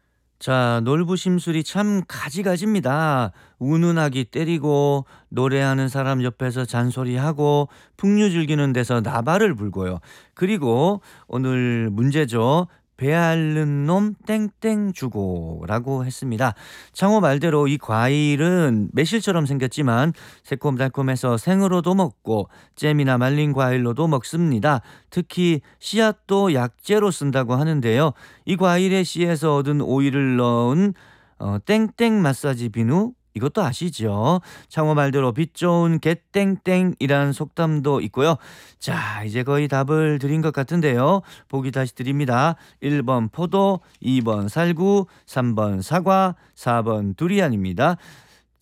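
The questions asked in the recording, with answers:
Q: 그리고 오늘 문제죠. 배앓는 놈 땡땡 주고라고 했습니다.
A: 2: 살구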